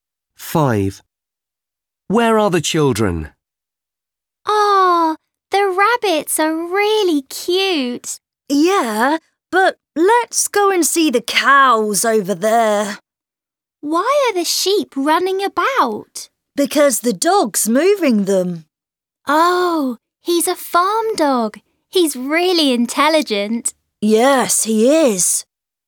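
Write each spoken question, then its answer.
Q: Where are the children?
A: On a farm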